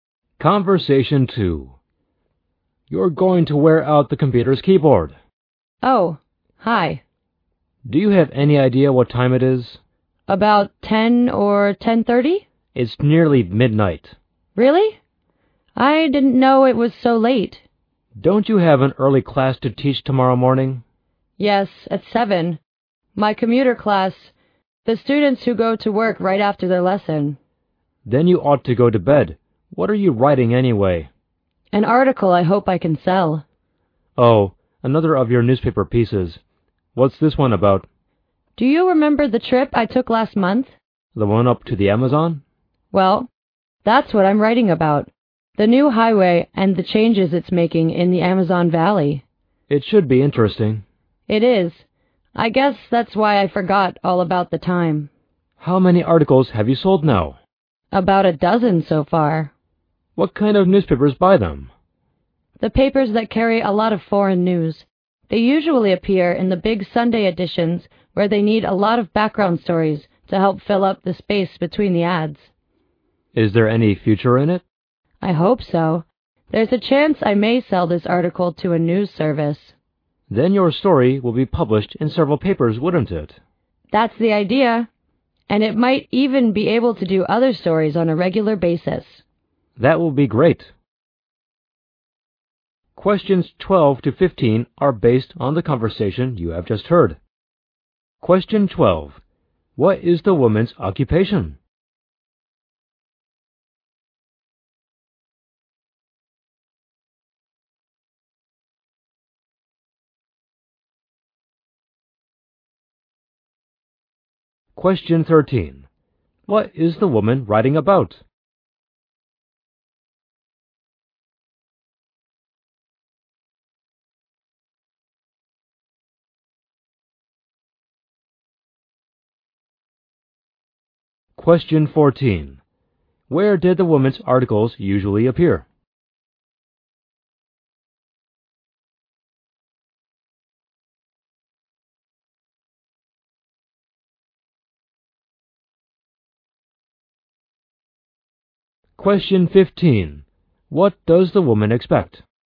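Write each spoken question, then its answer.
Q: What is the woman's occupation?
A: A teacher who also writes newspaper articles.

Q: What is the woman writing about?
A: The new highway and the changes it's making in the Amazon Valley.

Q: Where did the woman's articles usually appear?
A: In the big Sunday editions of papers that carry a lot of foreign news.

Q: What does the woman expect?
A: To sell her article to a news service.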